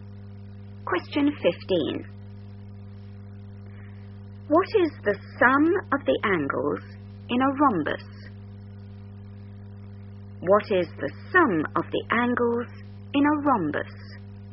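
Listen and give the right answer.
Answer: 360 degrees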